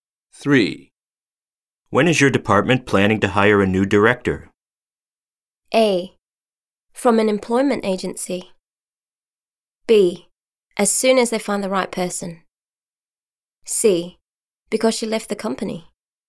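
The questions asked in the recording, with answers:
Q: When is your department planning to hire a new director?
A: B: As soon as they find the right person.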